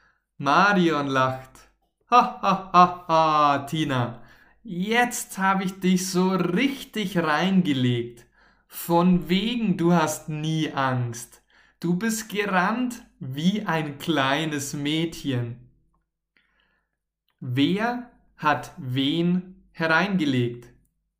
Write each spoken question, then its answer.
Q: Wer hat wen hereingelegt?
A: Marion hat Tina hereingelegt.